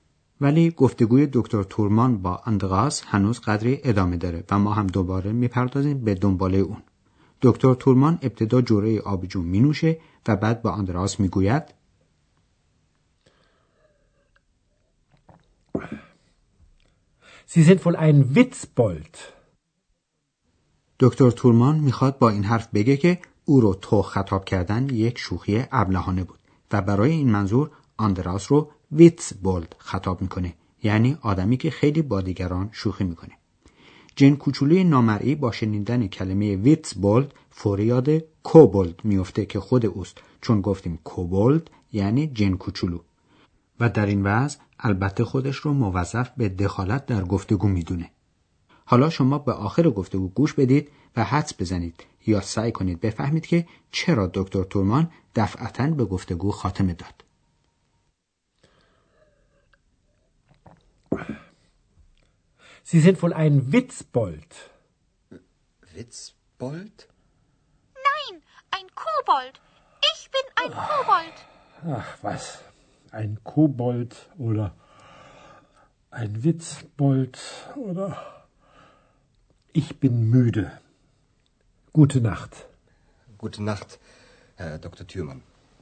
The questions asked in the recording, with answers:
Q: حدس بزنید یا سعی کنید بفهمید که چرا دکتر تورمان دفعتا به گفتگو خاتمه داد.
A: جواب سوال قبلی ما این است که دکتر تورمان به گفتگو خاتمه داد چون موده یعنی خسته بود.